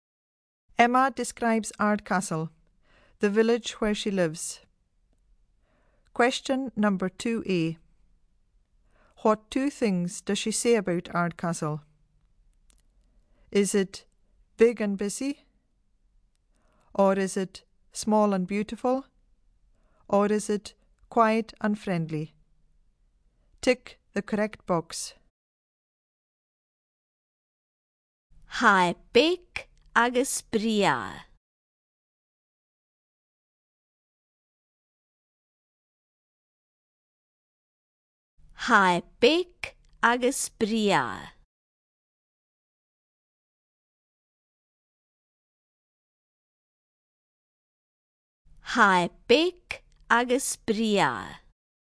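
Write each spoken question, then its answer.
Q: What two things does she say about Ardcastle?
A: B: small and beautiful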